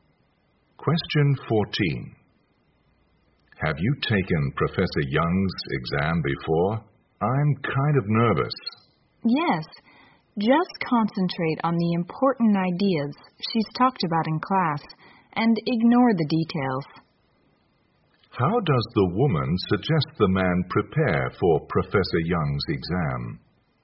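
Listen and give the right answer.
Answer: Focus on the important ideas from class and ignore the details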